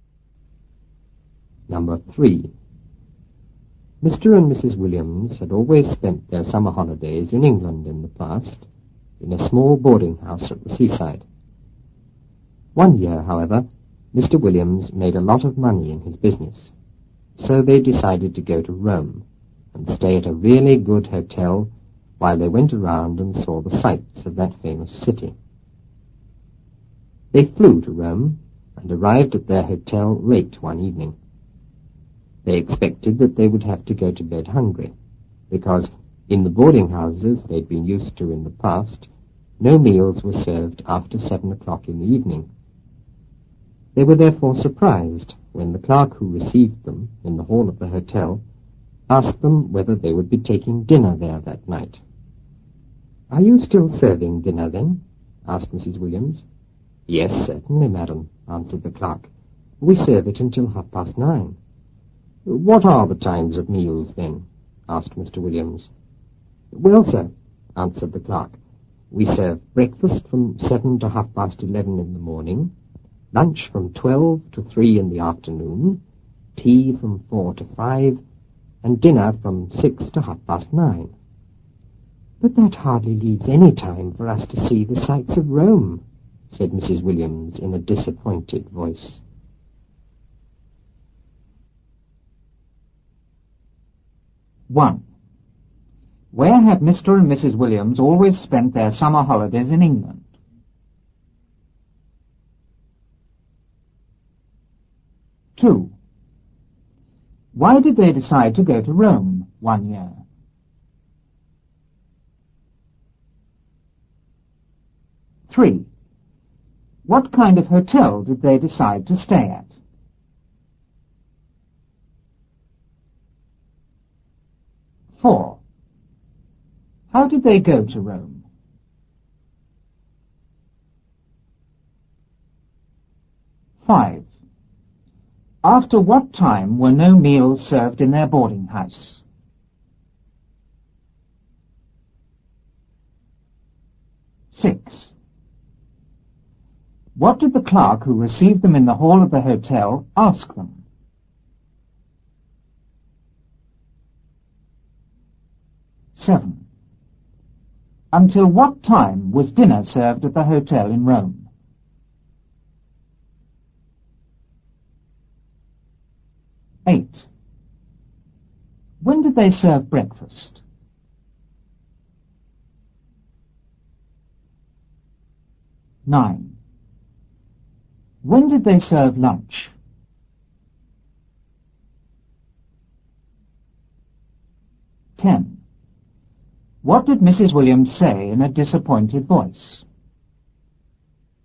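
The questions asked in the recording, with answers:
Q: Where have Mr. and Mrs. Williams always spent their summer holidays in England?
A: In a small boarding house at the seaside

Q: Why did they decide to go to Rome one year?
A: Mr. Williams made a lot of money in his business

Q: What kind of hotel did they decide to stay at?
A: A really good hotel

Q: How did they go to Rome?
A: They flew

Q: After what time were no meals served in their boarding house?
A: After 7 o'clock in the evening

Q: What did the clerk who received them in the hall of the hotel ask them?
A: Whether they would be taking dinner there that night

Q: Until what time was dinner served at the hotel in Rome?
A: Until 9:30

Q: When did they serve breakfast?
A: From 7 to 11:30 in the morning

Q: When did they serve lunch?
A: From 12 to 3 in the afternoon

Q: What did Mrs. Williams say in a disappointed voice?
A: But that hardly leaves any time for us to see the sights of Rome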